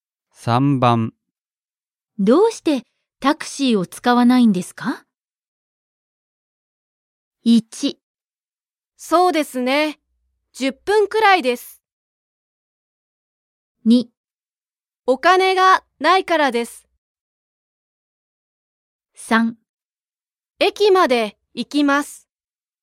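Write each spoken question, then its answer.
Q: どうしてタクシーを使わないんですか?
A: 2: お金がないからです。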